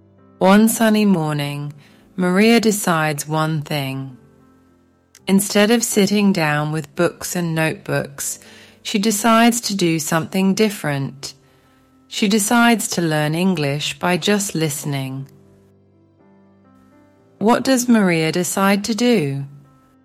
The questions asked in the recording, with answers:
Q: What does Maria decide to do?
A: To listen to English. She decides to learn English by just listening.